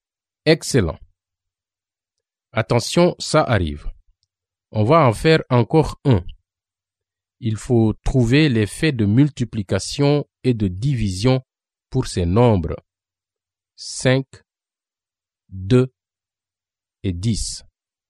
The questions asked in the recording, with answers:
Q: Il faut trouver les faits de multiplication et de division pour ces nombres 5, 2 et 10.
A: Les faits de multiplication sont 5 multiplié par 2 égale 10 et 2 multiplié par 5 égale 10.